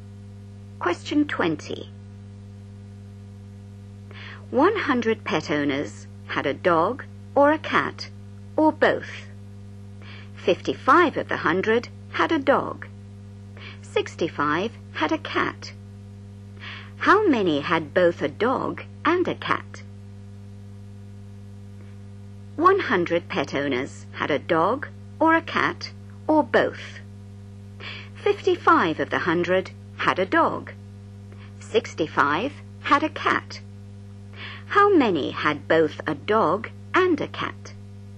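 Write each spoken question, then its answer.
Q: How many had both a dog and a cat?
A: 20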